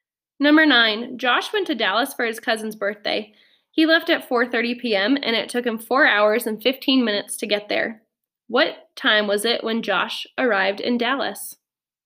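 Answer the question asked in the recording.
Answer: 8:45 p.m.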